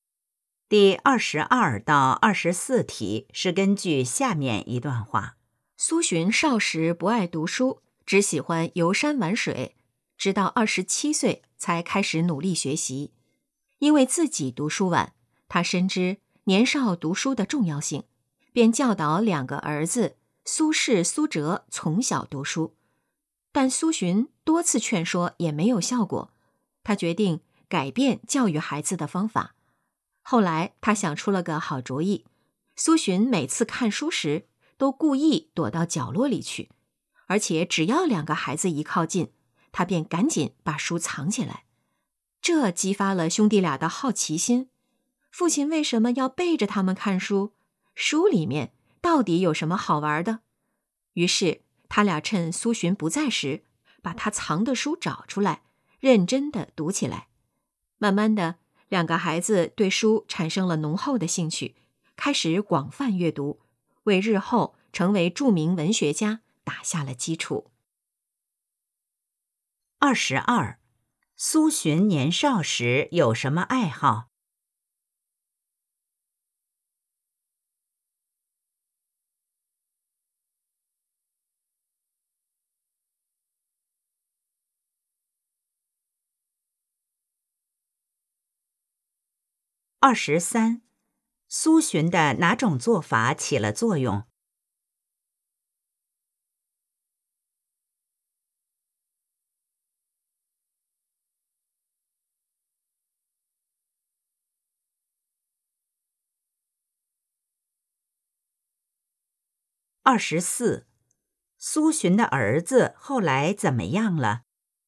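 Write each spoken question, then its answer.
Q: 苏洵年少时有什么爱好?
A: 游山玩水

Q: 苏洵的哪种做法起了作用?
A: 故意躲着孩子看书、把书藏起来

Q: 苏洵的儿子后来怎么样了?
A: 成为著名文学家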